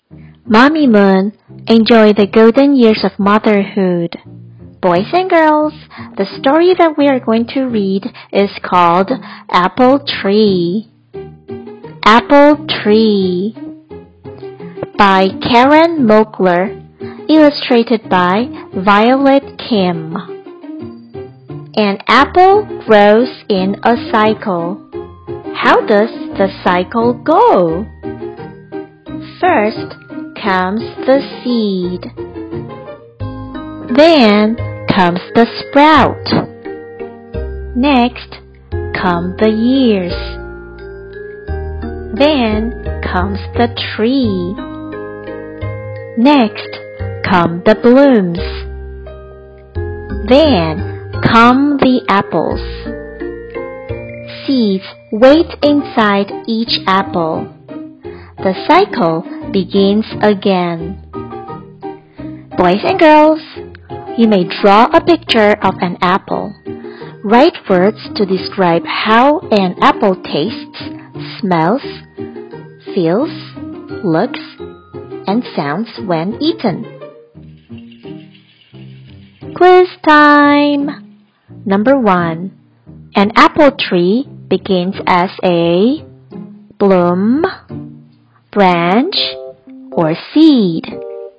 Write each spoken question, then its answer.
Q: An apple tree begins as a bloom branch, or seed?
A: The answer is seed.